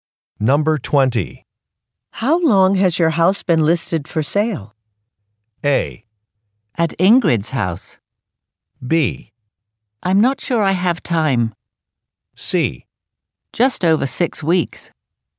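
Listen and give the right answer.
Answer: C: Just over 6 weeks.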